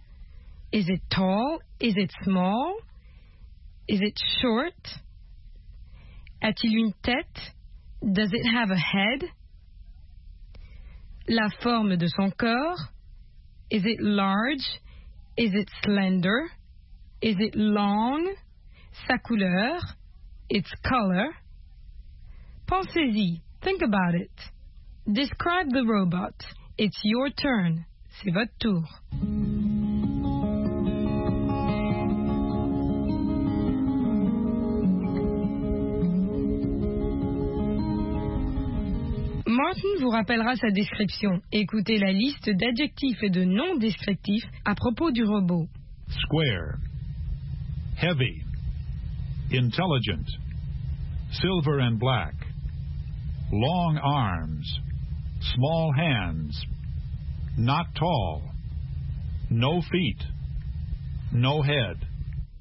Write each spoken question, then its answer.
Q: Is it tall?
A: not tall

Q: Does it have a head?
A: no head